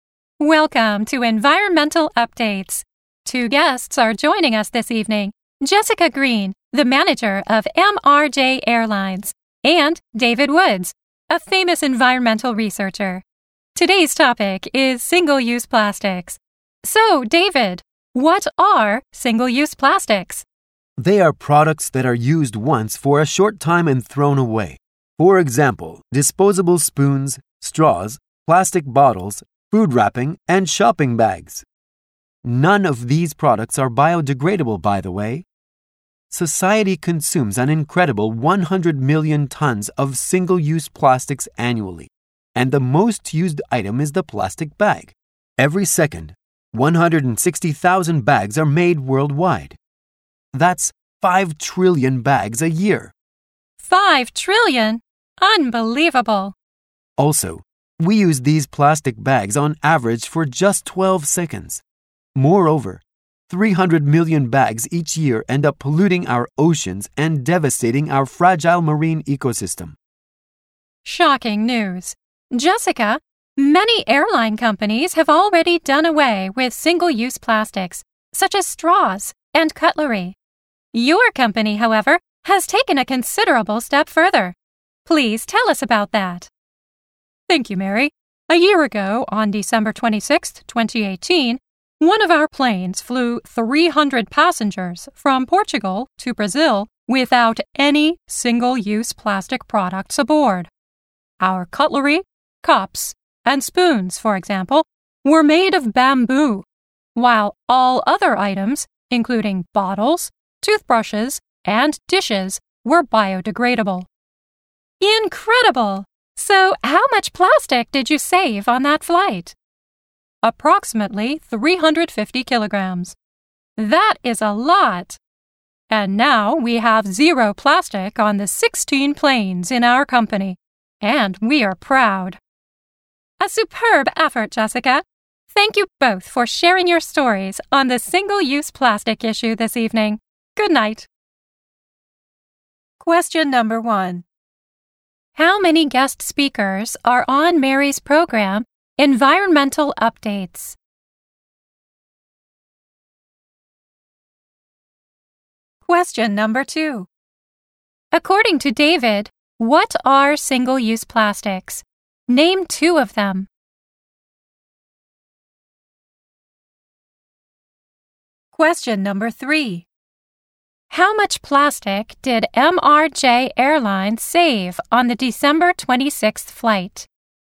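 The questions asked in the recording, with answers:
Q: How many guest speakers are on Mary's program, Environmental Updates?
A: Two.

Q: According to David, what are single-use plastics? Name two of them.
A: Products used once for a short time and thrown away, e.g. disposable spoons and straws.

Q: How much plastic did MRJ Airlines save on the December 26th flight?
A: About 350 kilograms.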